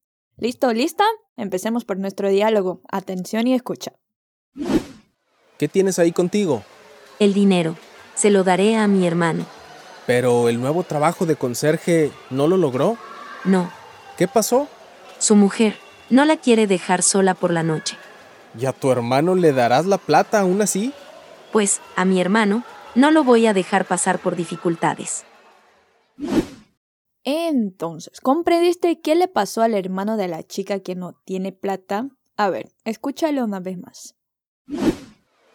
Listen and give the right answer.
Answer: O sea que su hermano rechazó el trabajo porque no quiso dejar sola a su mujer por la noche.